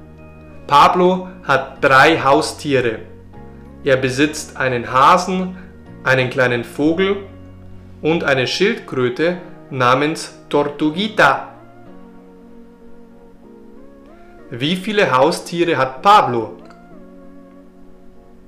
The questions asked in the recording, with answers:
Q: Wie viele Haustiere hat Pablo?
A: Drei.